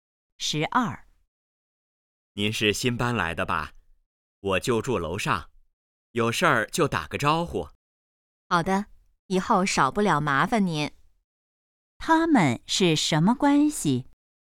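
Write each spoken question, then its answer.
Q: 他们是什么关系?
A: 邻居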